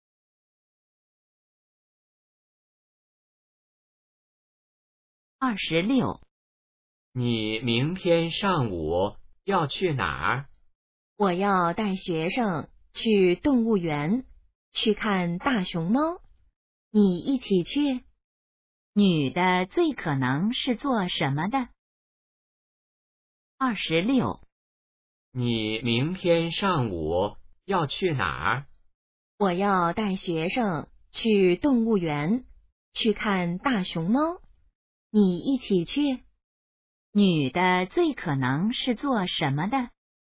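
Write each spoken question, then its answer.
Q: 女的最可能是做什么的?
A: 老师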